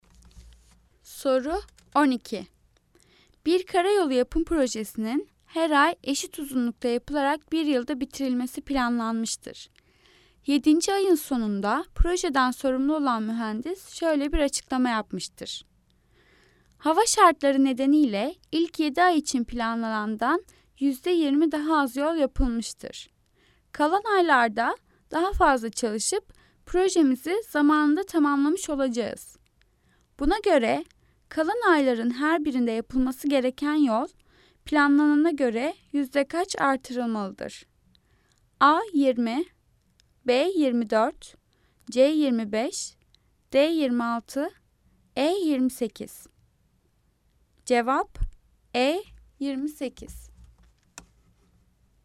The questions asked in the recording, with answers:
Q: Buna göre kalan ayların her birinde yapılması gereken yol planlanana göre yüzde kaç artırılmalıdır?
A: Cevap E 28.